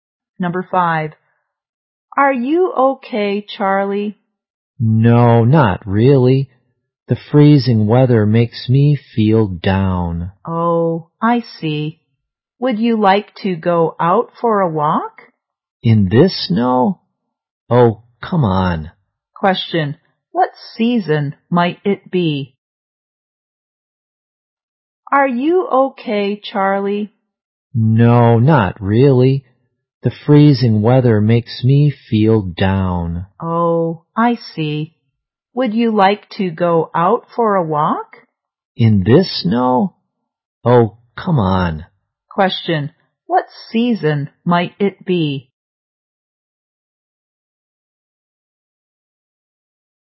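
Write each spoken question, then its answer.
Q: what season might it be?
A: Winter.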